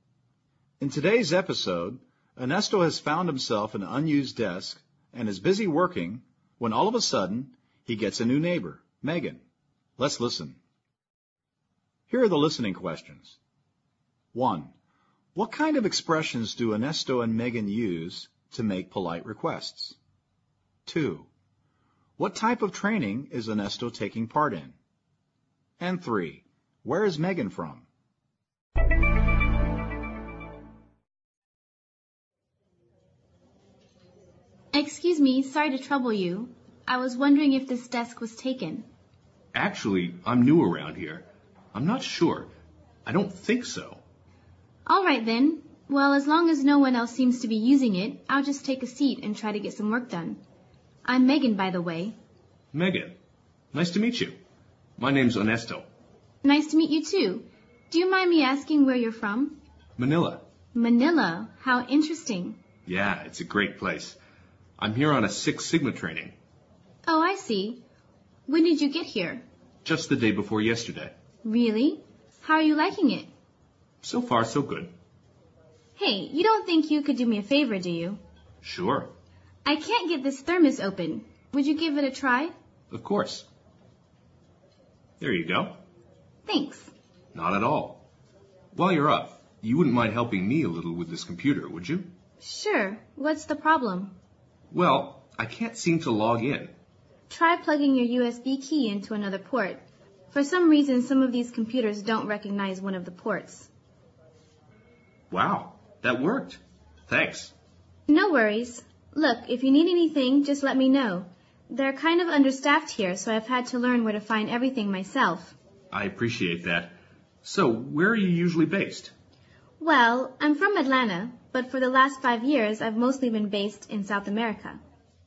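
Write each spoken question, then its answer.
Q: What kind of expressions do Ernesto and Megan use to make polite requests?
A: Indirect polite request forms, e.g. "I was wondering if", "Do you mind me asking", "you wouldn't mind ..., would you?"

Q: What type of training is Ernesto taking part in?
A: Ernesto says he has come to Michigan for Six Sigma training

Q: Where is Megan from?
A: Atlanta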